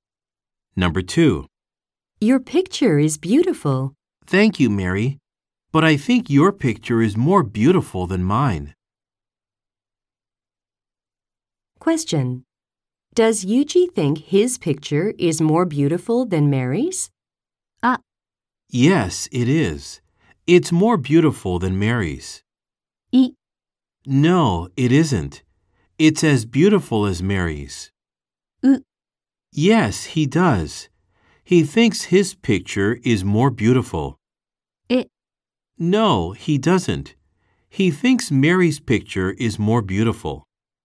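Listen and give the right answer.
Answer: E: No, he doesn't. He thinks Mary's picture is more beautiful.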